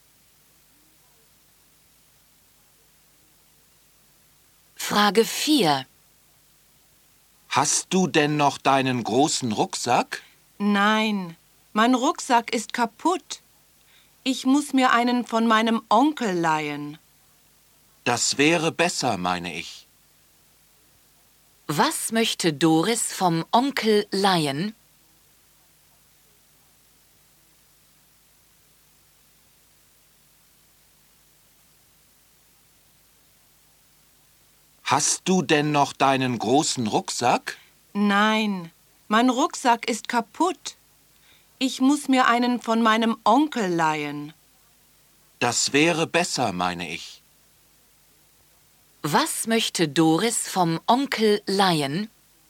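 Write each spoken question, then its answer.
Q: Was möchte Doris vom Onkel leihen?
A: Einen Rucksack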